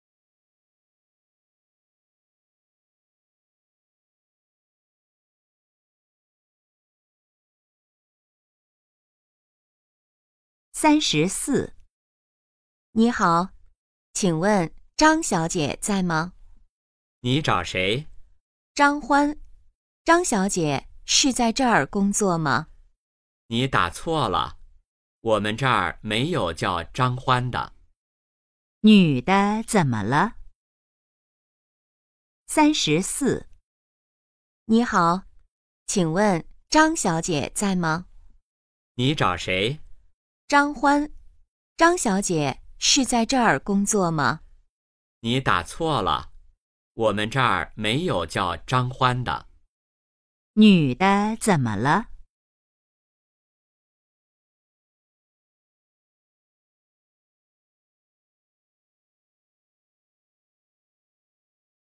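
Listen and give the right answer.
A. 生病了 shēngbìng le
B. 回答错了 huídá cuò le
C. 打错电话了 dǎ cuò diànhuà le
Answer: C. 打错电话了 dǎ cuò diànhuà le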